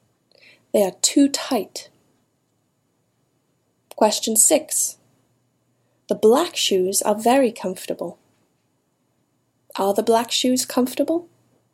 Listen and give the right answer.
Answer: Yes. The black shoes are very comfortable.